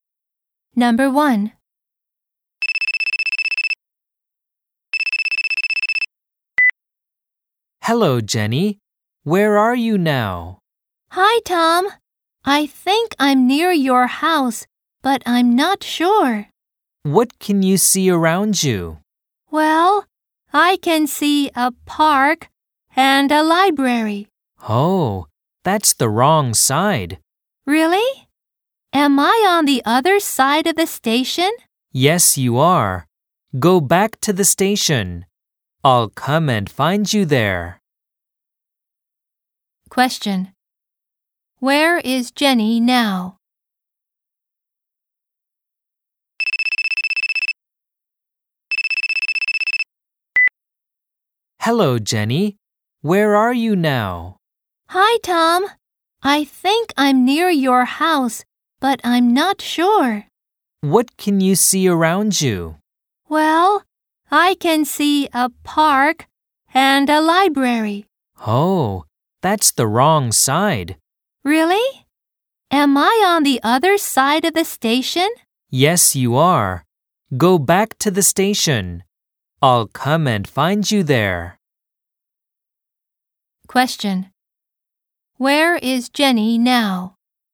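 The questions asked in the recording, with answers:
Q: Where is Jenny now?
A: Near a park and a library, on the other side of the station from Tom's house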